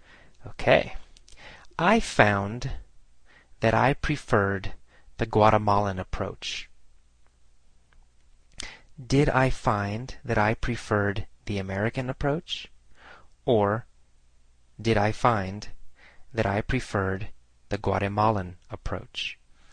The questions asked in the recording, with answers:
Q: Or did I find that I preferred the Guatemalan approach?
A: Well, the Guatemalan approach.